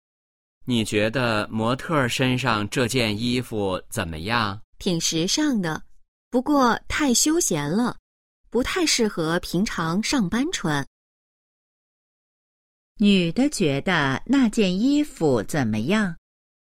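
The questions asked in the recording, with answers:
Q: 女的觉得那件衣服怎么样?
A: 挺时尚,但太休闲,不适合上班穿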